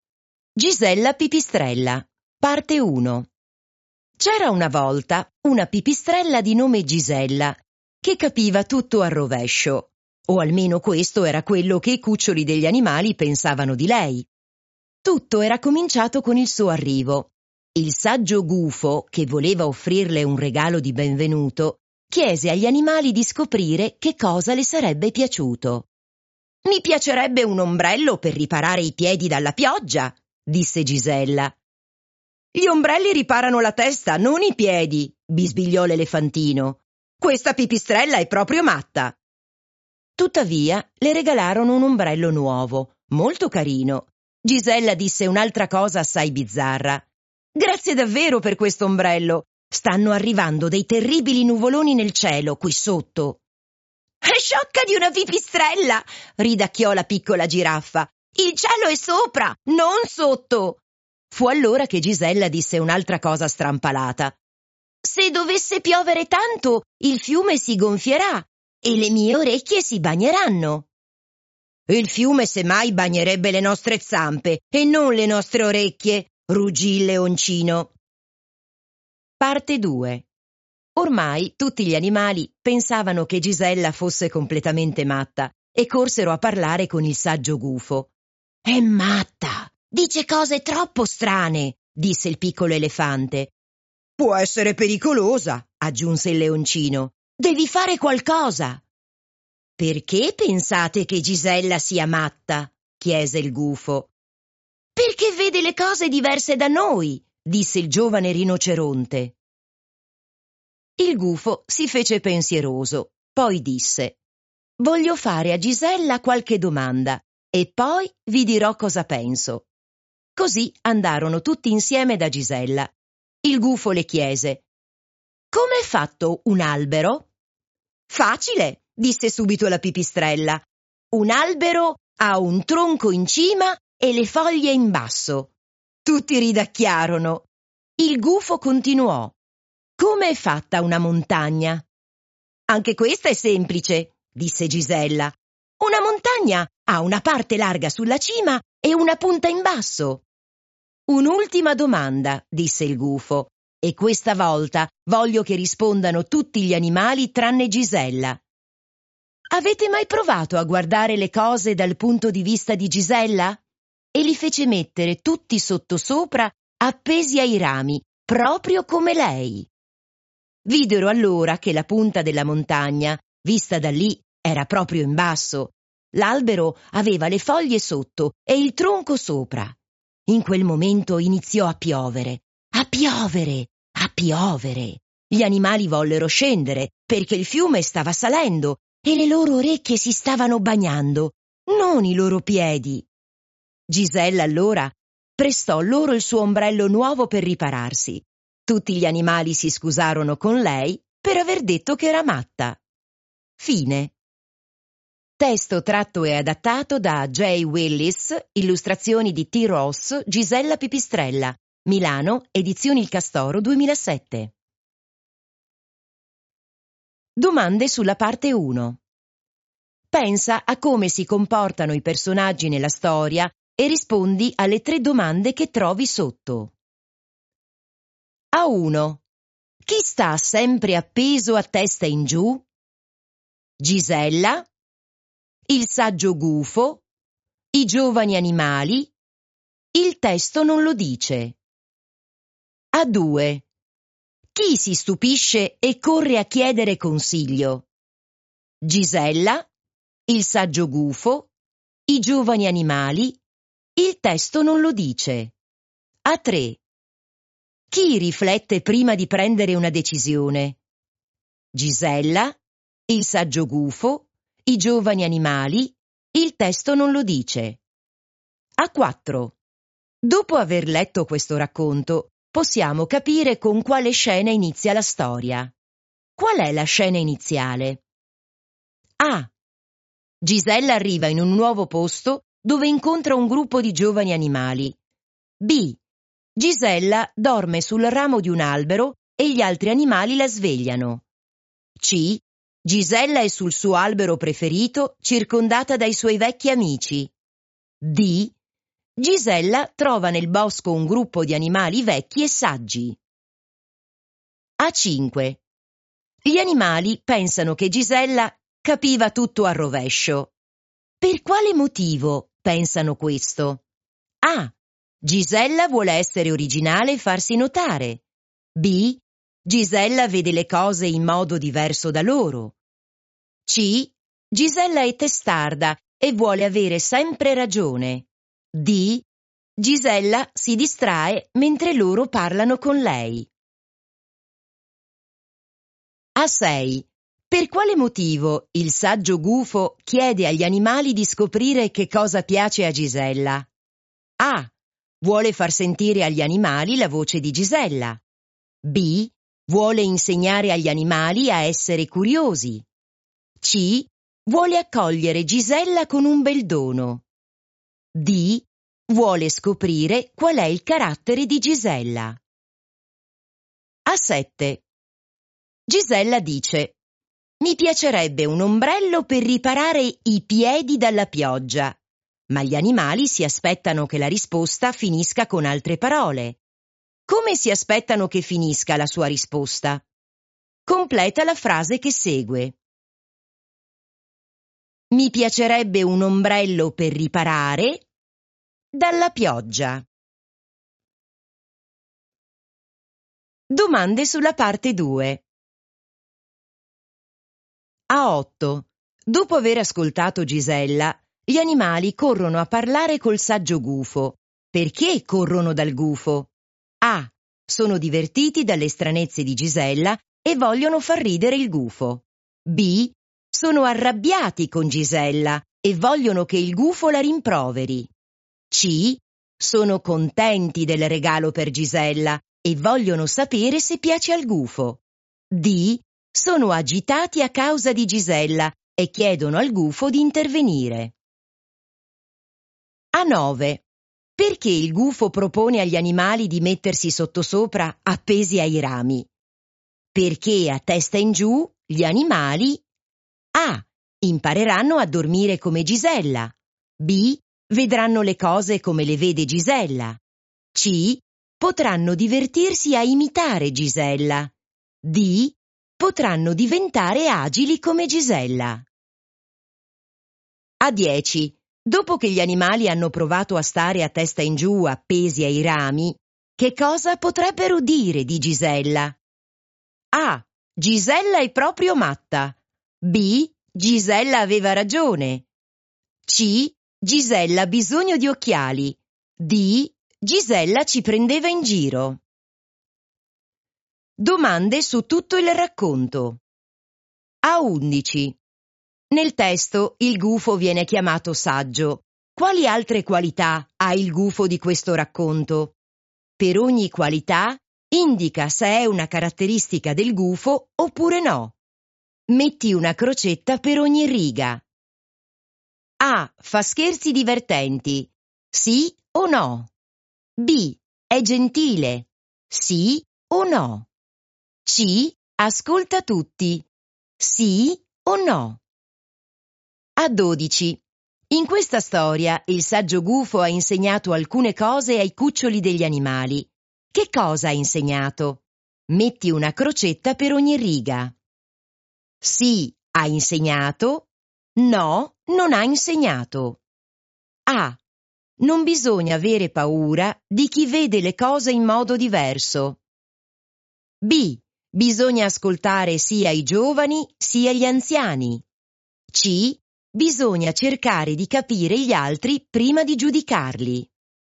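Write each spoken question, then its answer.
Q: Chi sta sempre appeso a testa in giù?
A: Gisella

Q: Chi si stupisce e corre a chiedere consiglio?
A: i giovani animali

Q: Chi riflette prima di prendere una decisione?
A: il saggio gufo

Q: Qual è la scena iniziale?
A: A: Gisella arriva in un nuovo posto dove incontra un gruppo di giovani animali.

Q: Per quale motivo pensano questo?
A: B: Gisella vede le cose in modo diverso da loro.

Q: Per quale motivo il saggio gufo chiede agli animali di scoprire che cosa piace a Gisella?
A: C: Vuole accogliere Gisella con un bel dono.

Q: Come si aspettano che finisca la sua risposta?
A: la testa

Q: Perché corrono dal gufo?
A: D: Sono agitati a causa di Gisella e chiedono al gufo di intervenire.

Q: Perché il gufo propone agli animali di mettersi sottosopra appesi ai rami?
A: B: vedranno le cose come le vede Gisella.

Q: Dopo che gli animali hanno provato a stare a testa in giù appesi ai rami, che cosa potrebbero dire di Gisella?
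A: B: Gisella aveva ragione.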